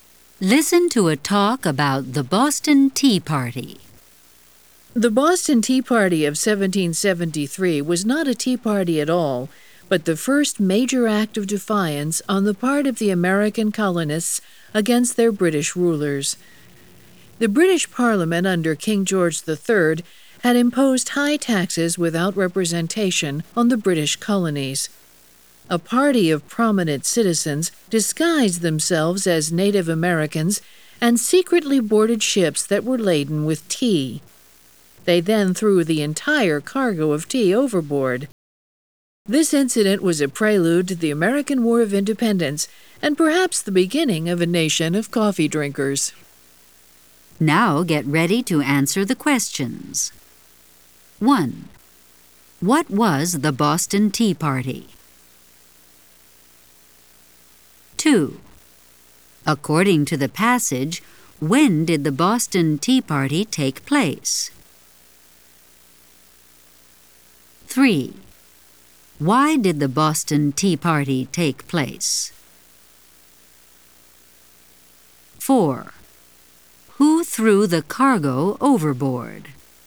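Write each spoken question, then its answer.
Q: What was the Boston Tea Party?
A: The first major act of defiance by American colonists against British rule

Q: According to the passage, when did the Boston Tea Party take place?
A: 1773

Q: Why did the Boston Tea Party take place?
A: Britain imposed high taxes without representation on the colonies

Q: Who threw the cargo overboard?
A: Prominent citizens disguised as Native Americans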